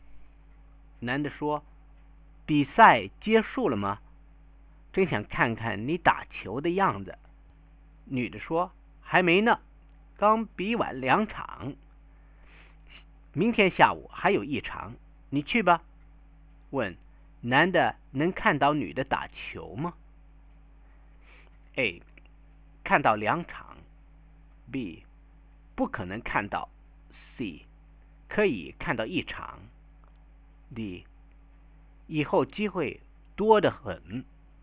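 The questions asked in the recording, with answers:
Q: 男的能看到女的打球吗?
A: C: 可以看到一场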